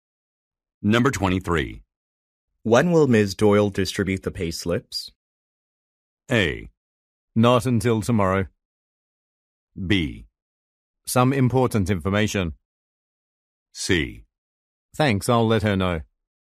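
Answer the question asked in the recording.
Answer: A: Not until tomorrow.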